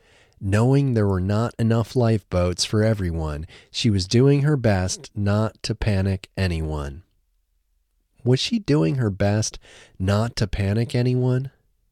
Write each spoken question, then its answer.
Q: Was she doing her best not to panic anyone?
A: Yes, she was doing her best not to panic anyone.